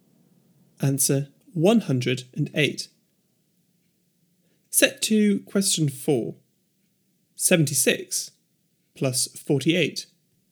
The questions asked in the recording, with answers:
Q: 76 plus 48.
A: 124.